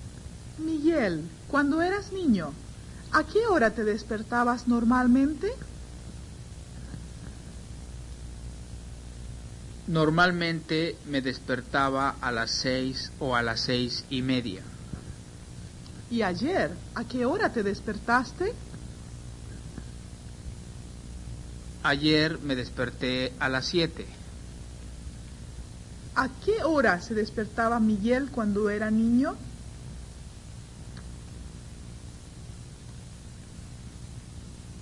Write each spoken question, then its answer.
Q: ¿A qué hora se despertaba Miguel cuando era niño?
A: Miguel se despertaba a las 6 o a las 6:30.